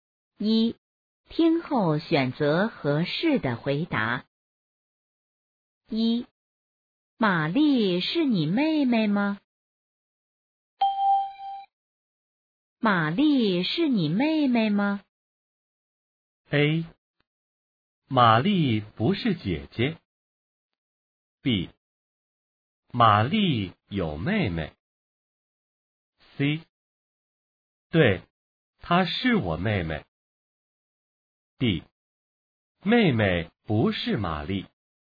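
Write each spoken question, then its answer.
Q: 玛丽是你妹妹吗?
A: C: 对,她是我妹妹。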